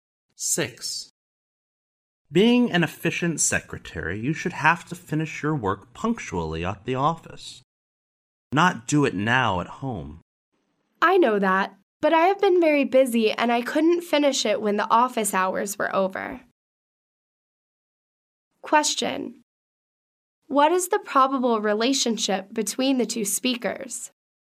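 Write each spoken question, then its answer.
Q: What is the probable relationship between the two speakers?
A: Boss and secretary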